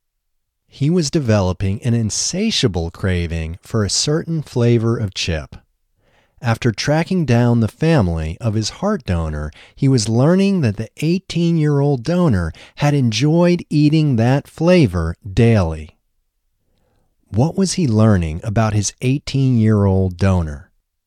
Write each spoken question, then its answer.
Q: What was he learning about his 18-year-old donor?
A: He was learning that the 18-year-old donor had enjoyed eating that flavor daily.